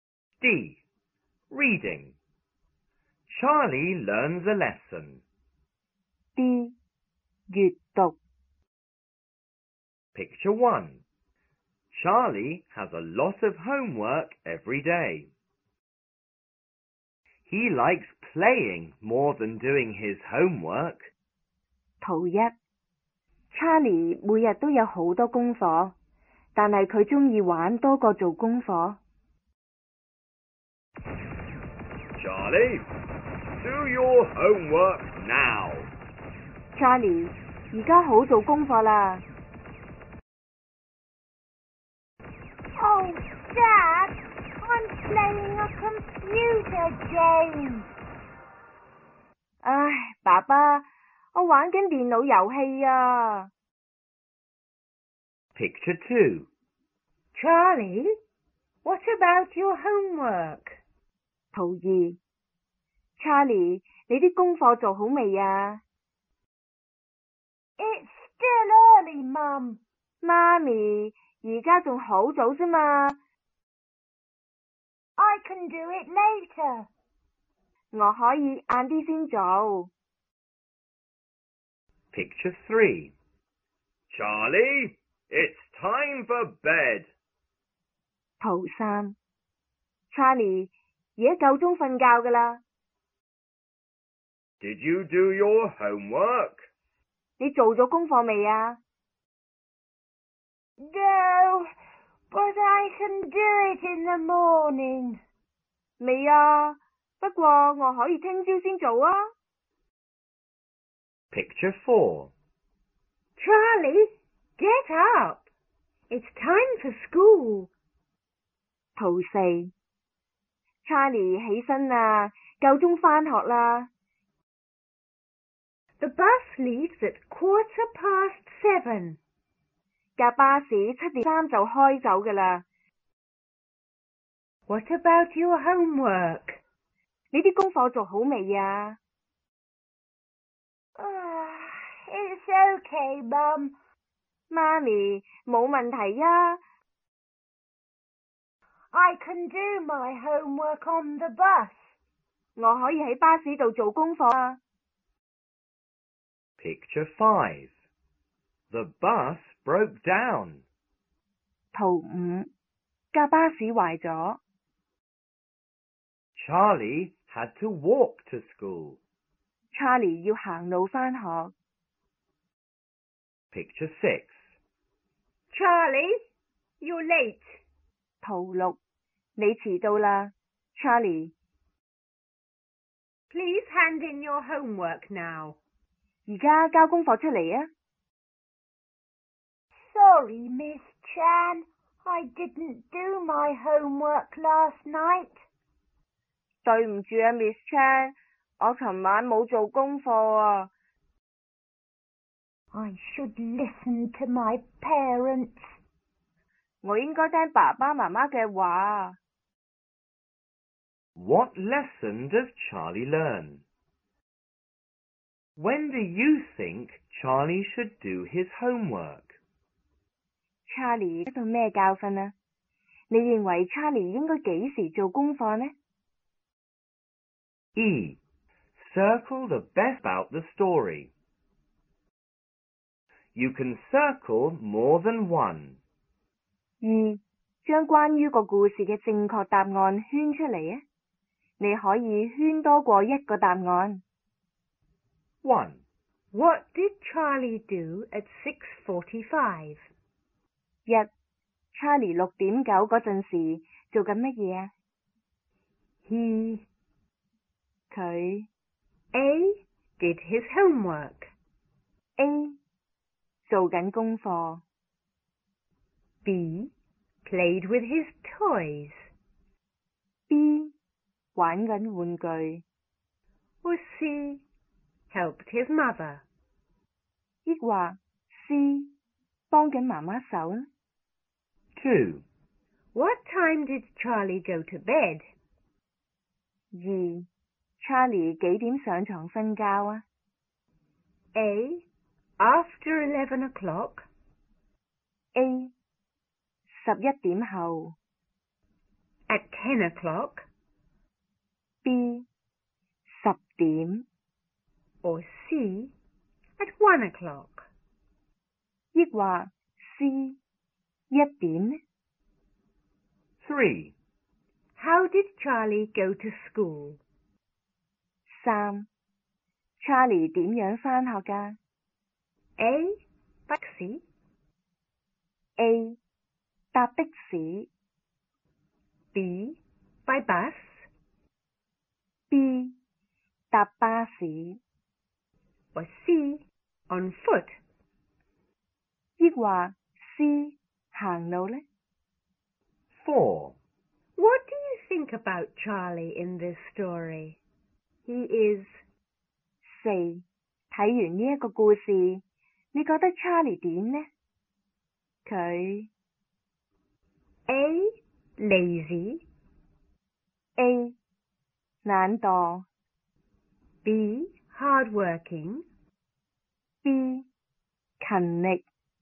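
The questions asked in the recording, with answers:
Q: How did Charlie go to school?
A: C: On foot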